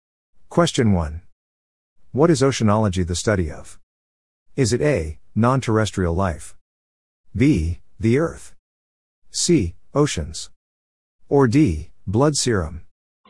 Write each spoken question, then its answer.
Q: What is oceanology the study of?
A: The answer is C. Oceans.